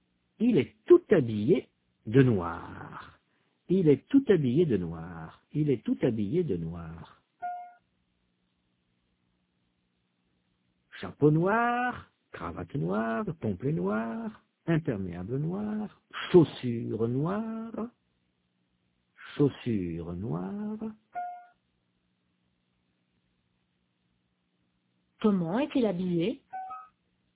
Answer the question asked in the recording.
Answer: Il est tout habillé de noir.